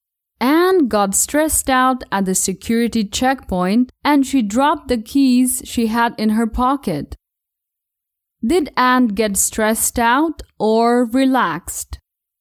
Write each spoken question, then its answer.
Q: Did Anne get stressed out or relaxed?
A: Anne didn't get relaxed. Actually, she got stressed out.